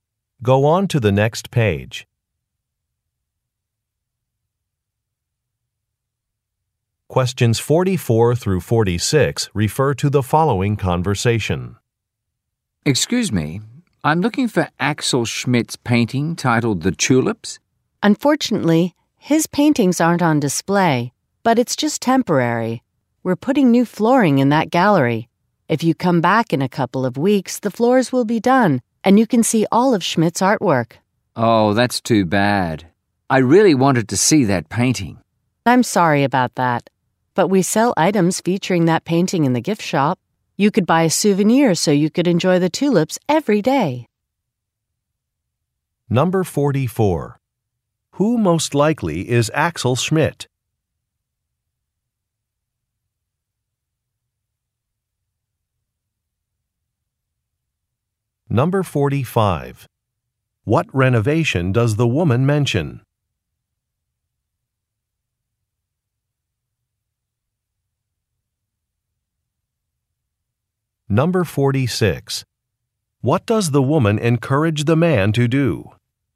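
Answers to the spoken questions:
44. A painter
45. New flooring in a gallery
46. Buy a souvenir in the gift shop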